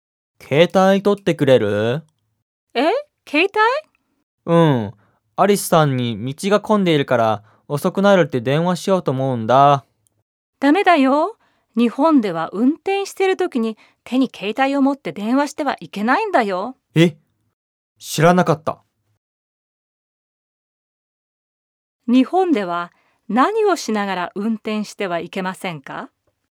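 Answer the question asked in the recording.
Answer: 手に携帯を持って電話しながら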